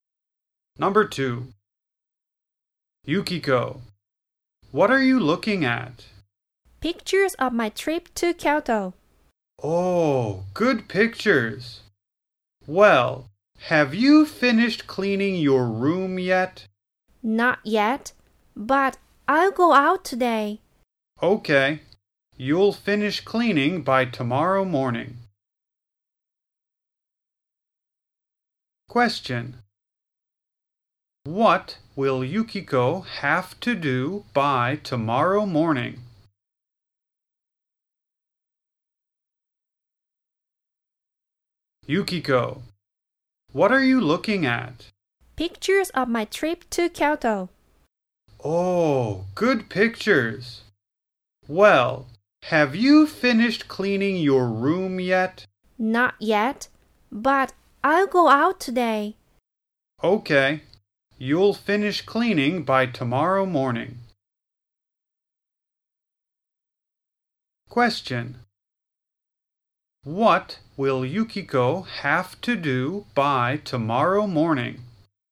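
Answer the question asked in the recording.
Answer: Finish cleaning her room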